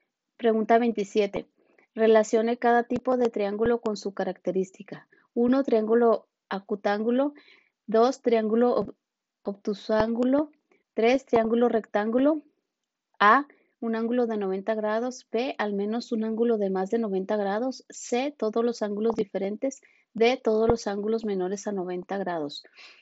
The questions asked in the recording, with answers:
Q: Relacione cada tipo de triángulo con su característica.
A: Y la respuesta correcta es la A, 1D, 2B, 3A.